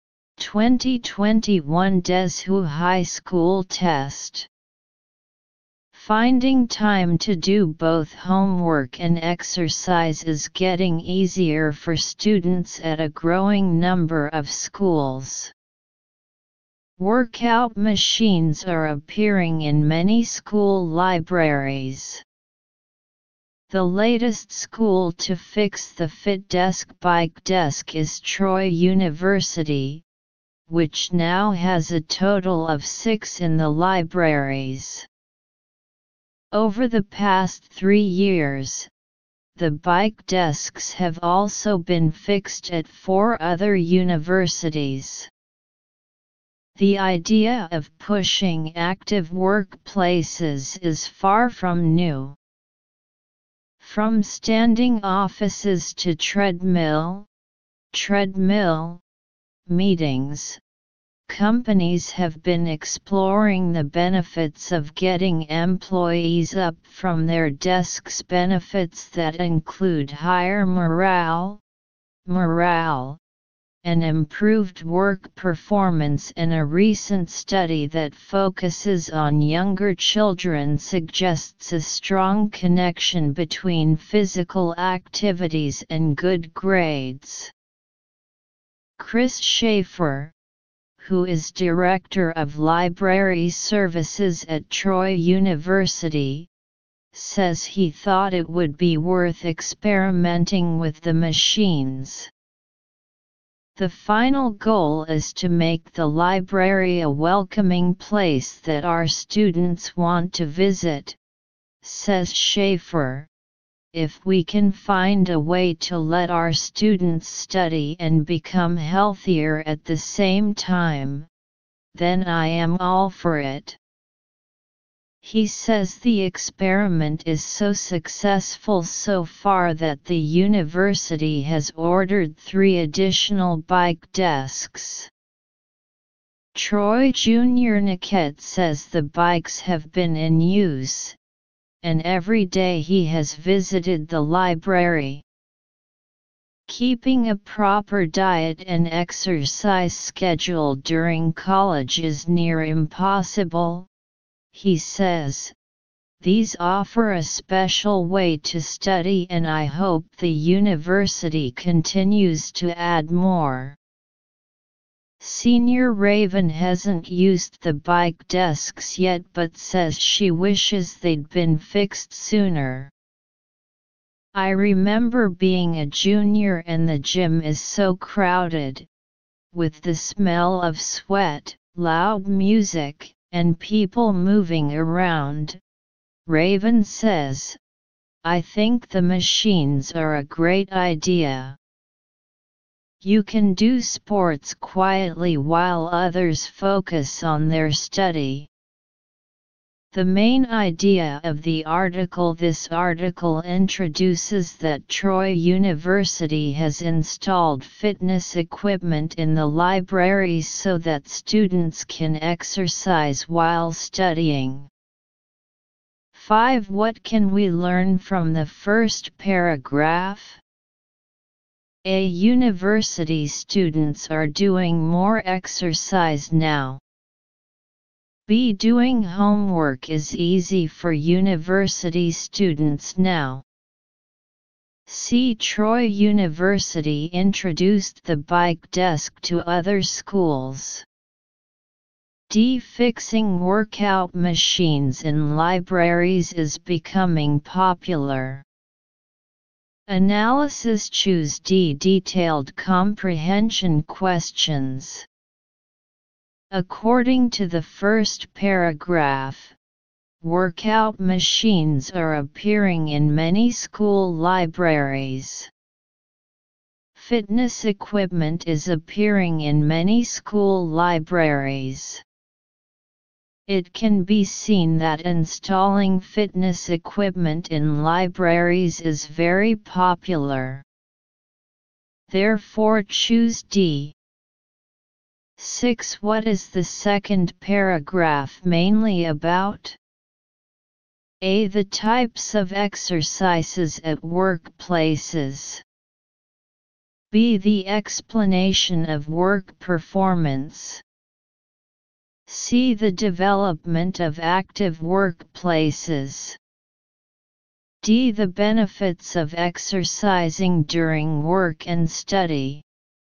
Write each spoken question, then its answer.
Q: What can we learn from the first paragraph?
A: choose D